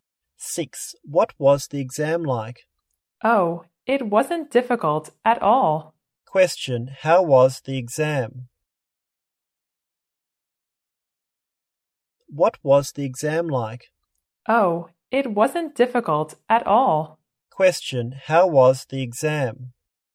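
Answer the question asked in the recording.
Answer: It wasn't difficult at all.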